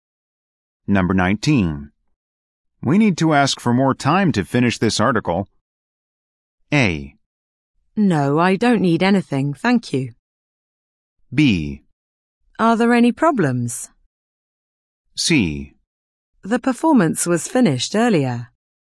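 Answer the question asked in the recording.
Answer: B: Are there any problems?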